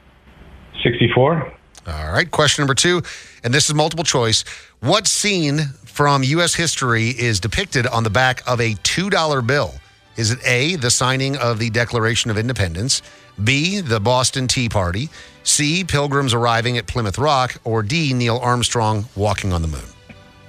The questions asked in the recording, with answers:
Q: What scene from U.S. history is depicted on the back of a $2 bill?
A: It's A, signing the Declaration of Independence.